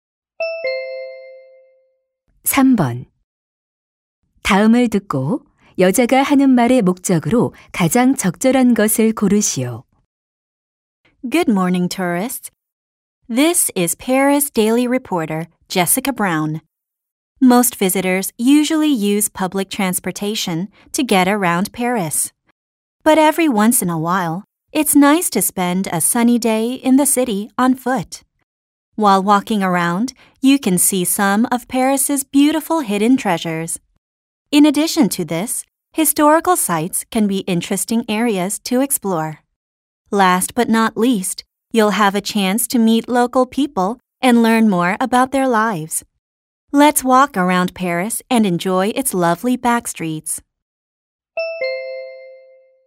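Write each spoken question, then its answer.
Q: 다음을 듣고 여자가 하는 말의 목적으로 가장 적절한 것을 고르시오.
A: 파리를 걸어서 관광하도록 권하려고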